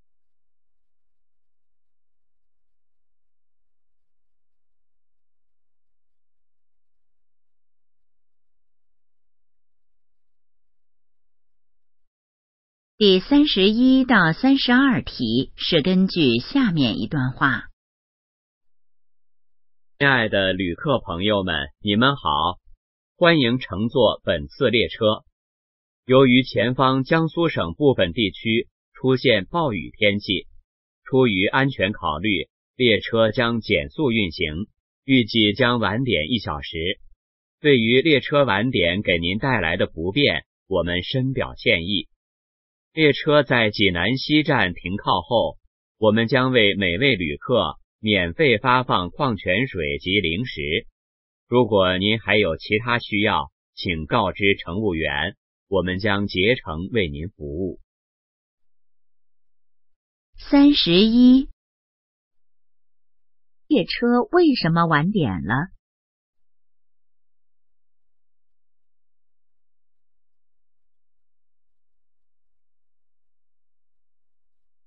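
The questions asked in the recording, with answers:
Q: 列车为什么晚点了?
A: 前方部分地区有暴雨,列车减速运行

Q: 车停靠济南西站后会做什么?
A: 免费发放矿泉水和零食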